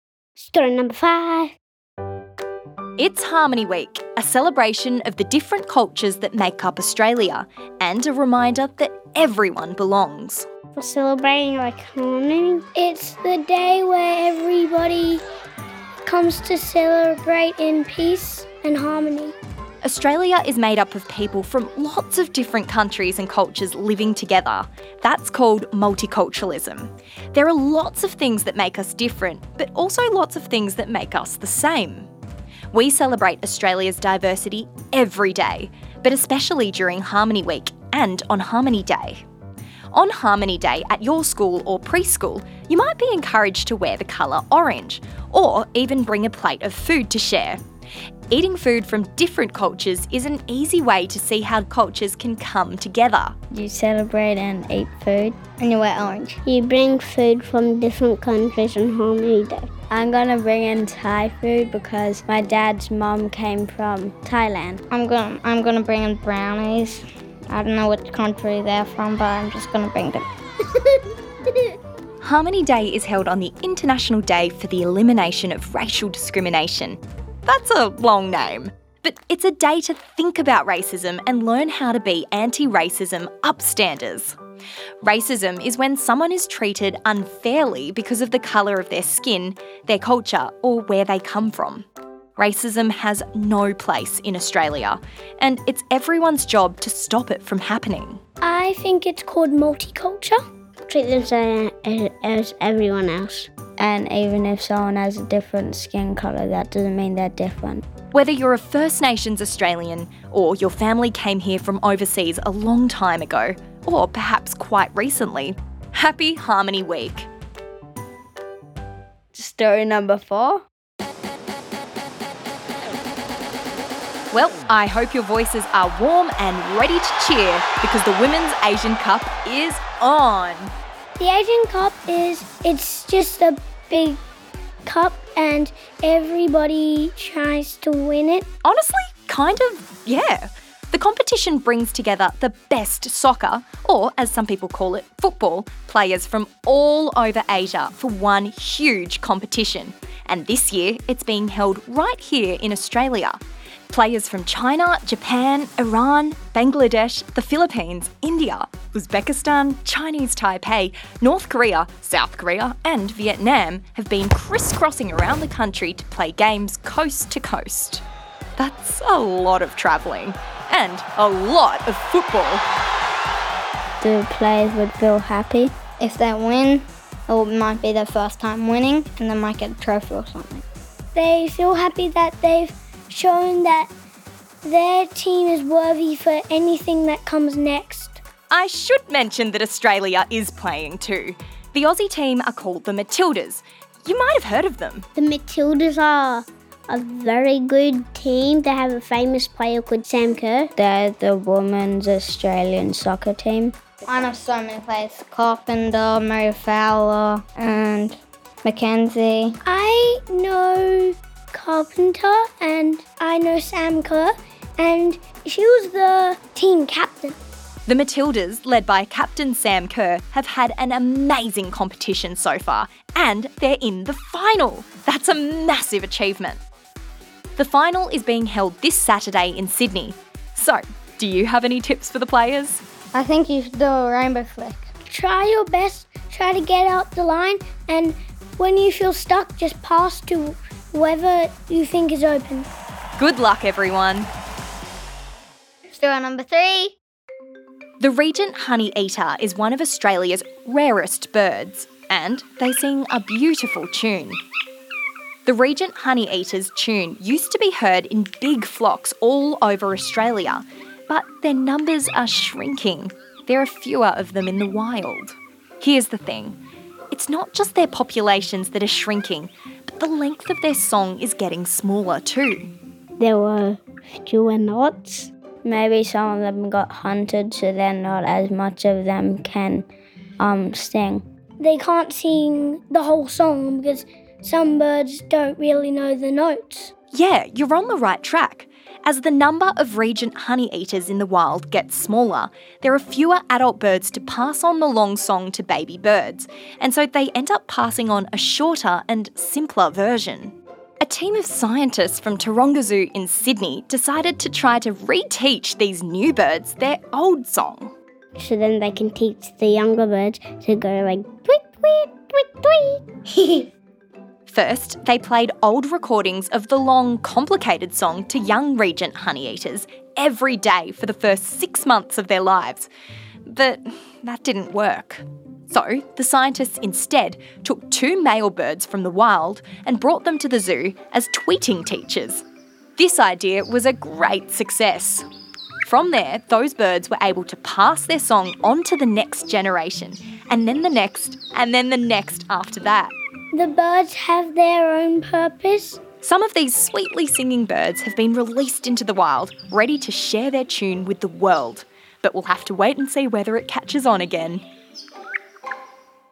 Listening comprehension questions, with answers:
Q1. What's the word, starting with m, for lots of different cultures living in harmony?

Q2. Who is the captain of the Matildas?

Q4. What species of bird has been re-taught their own long song?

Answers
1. Multiculturalism
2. Sam Kerr
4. Regent Honeyeater